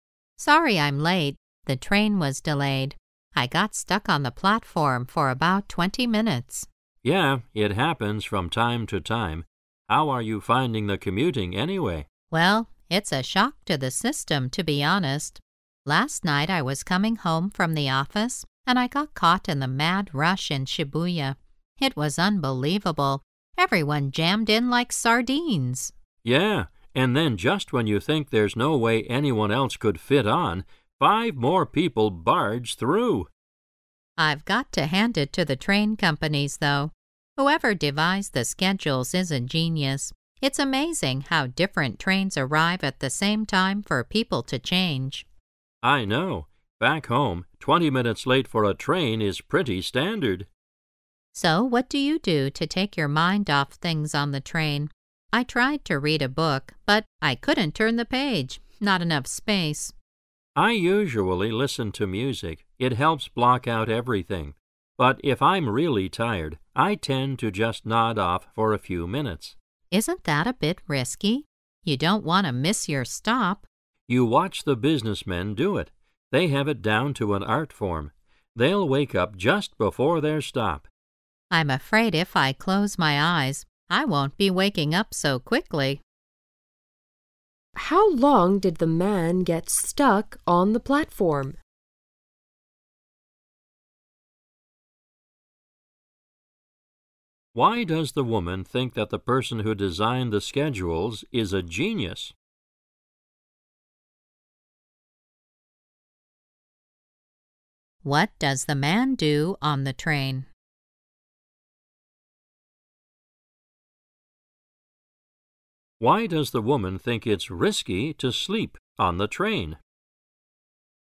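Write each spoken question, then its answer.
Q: How long did the man get stuck on the platform?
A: About 20 minutes

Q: Why does the woman think it's risky to sleep on the train?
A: You might miss your stop

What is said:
[听力原文] W: Sorry, I'm late. The train was delayed. I got stuck on the platform for about 20 minutes. M: Yeah, it happens from time to time. How are you finding the commuting anyway? W: Well, it's a shock to the system to be honest. Last night I was coming home from the office, and I got caught in the mad rash in Shibuya. It was unbelievable, everyone jammed in like sardines. M: Yeah, and then just when you think there's no way anyone else could fit on, five more people barge through! W: I've got a hand IT to the train companies though. Whoever devised the schedules is a genius. It's amazing how different trains arrive at the same time for people to change. M: I know. Back home, 20 minutes late for a train is pretty standard! 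W: So what do you do to take your mind off things on the train? I tried to read a book, but I couldn't turn the page—not enough space! M: I usually listen to music, it helps block out everything. But if I'm really tired, I tend to just nod off for a few minutes. W: Isn't that a bit risky? You don't wanna miss your stop. M: You watch the businessmen do it. They have it done to an art form. They'll wake up just before their stop. W: I'm afraid if I close my eyes, I won't be waking up so quickly!
[听力原文] Why does the woman think that the person who designed the schedules is a genius?
[听力原文] What does the man do on the train?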